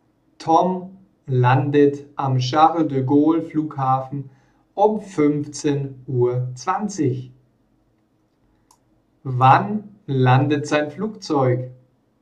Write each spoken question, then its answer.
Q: Wann landet sein Flugzeug?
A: Um 15:20 Uhr. Sein Flugzeug landet um 15:20 Uhr.